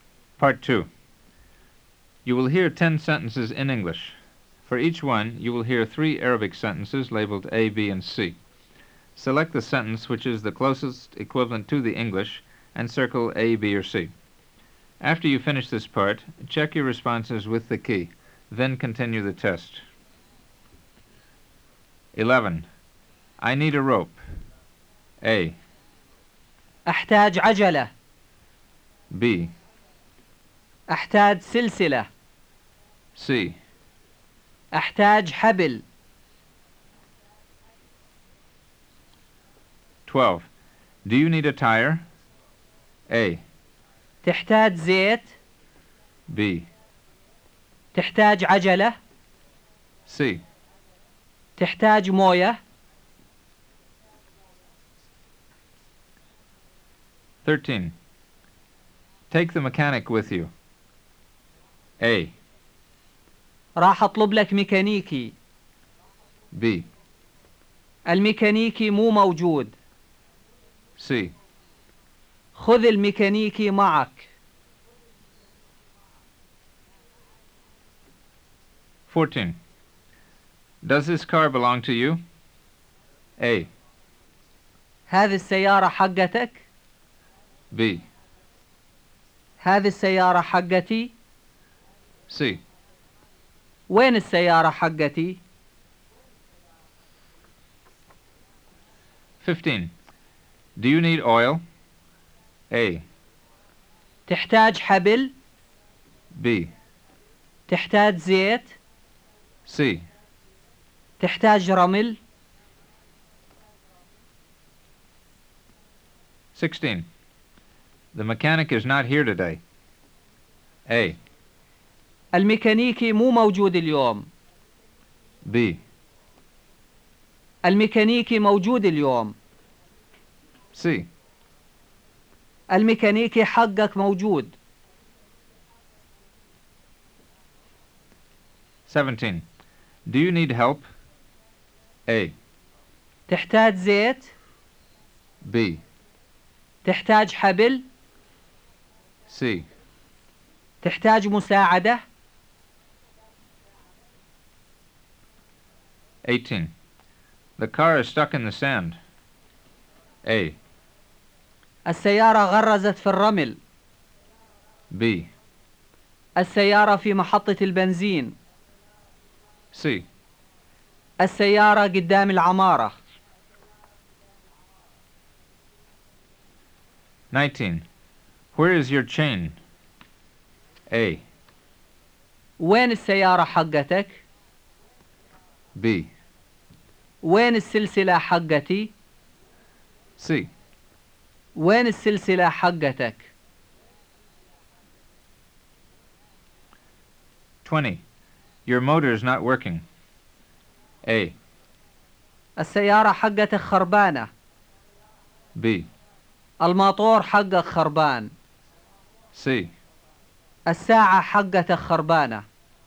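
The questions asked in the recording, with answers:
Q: I need a rope.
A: C: أحتاج حبل.

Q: Do you need a tire?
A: B: تحتاج عجلة.

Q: Take the mechanic with you.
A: C: خذ الميكانيكي معك.

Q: Does this car belong to you?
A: A: هذه السيارة حقتك؟

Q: Do you need oil?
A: B: تحتاج زيت؟

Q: The mechanic is not here today.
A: A: الميكانيكي مو موجود اليوم.

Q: Do you need help?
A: C: تحتاج مساعدة؟

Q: The car is stuck in the sand.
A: A: السيارة غرزت في الرمل.

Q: Where is your chain?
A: C: وين السلسلة حقتك؟

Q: Your motor is not working.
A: B: الماطور حقك خربان.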